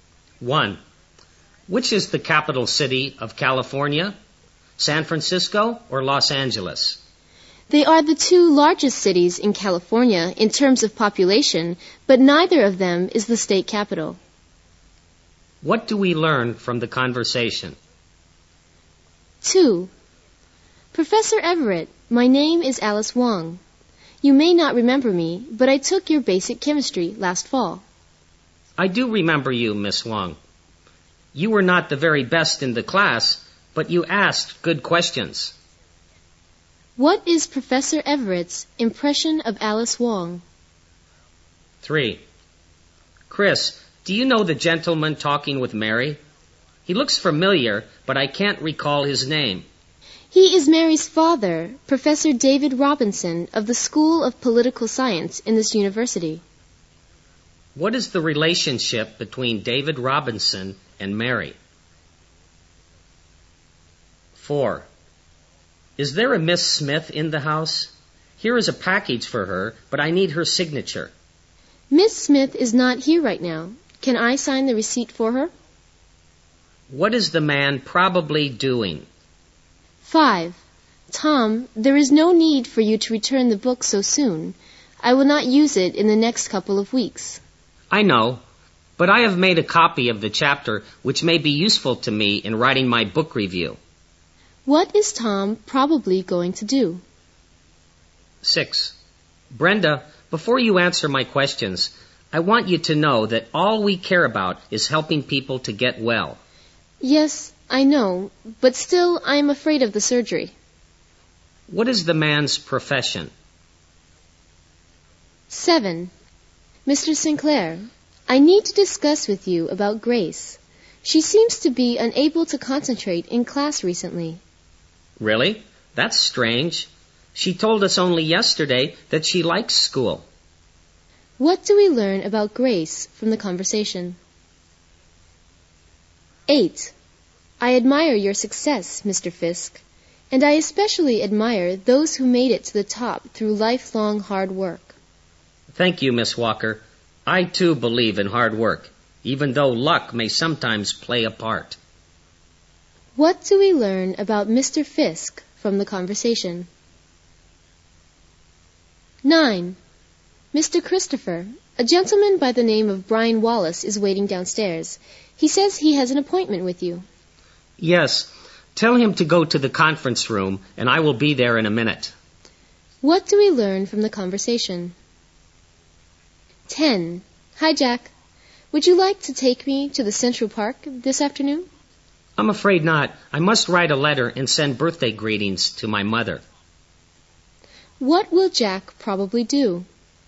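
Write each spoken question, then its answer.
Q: What do we learn from the conversation?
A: Neither San Francisco nor Los Angeles is California's capital

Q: What is Professor Everett's impression of Alice Wong?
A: She was not the best student but asked good questions

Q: What is the relationship between David Robinson and Mary?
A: He is Mary's father

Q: What is the man probably doing?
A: Delivering a package

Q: What is Tom probably going to do?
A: Return the book

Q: What is the man's profession?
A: A doctor (surgeon)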